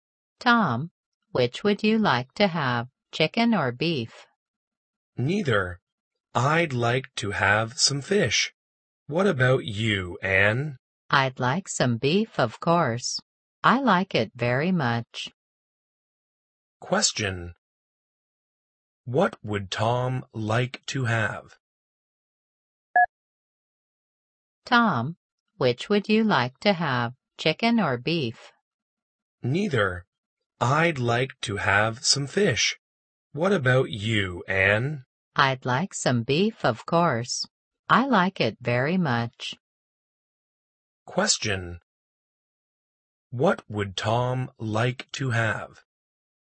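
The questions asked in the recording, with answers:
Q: What would Tom like to have?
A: Fish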